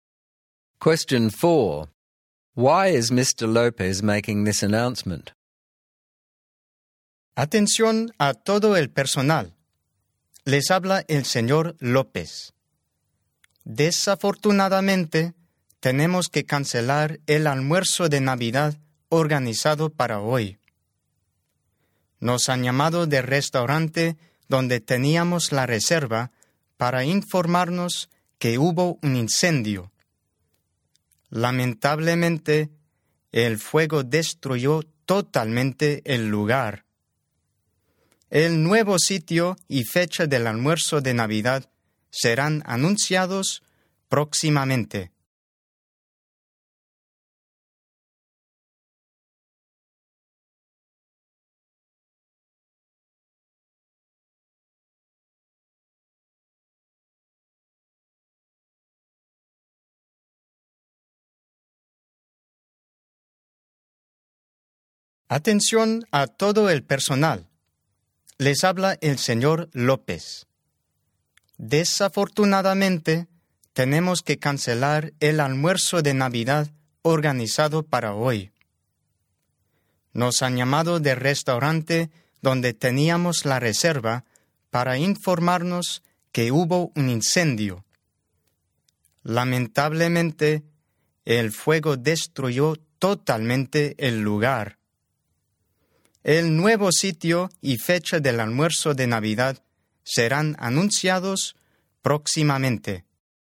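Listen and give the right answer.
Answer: To cancel today's staff Christmas lunch because a fire destroyed the restaurant; the new place and date will be announced soon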